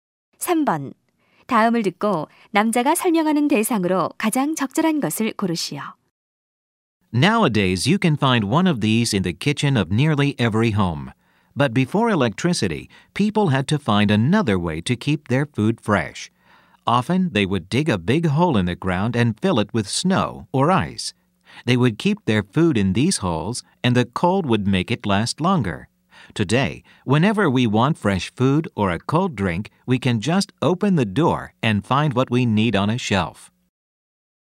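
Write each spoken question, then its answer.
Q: 다음을 듣고 남자가 설명하는 대상으로 가장 적절한 것을 고르시오.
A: 냉장고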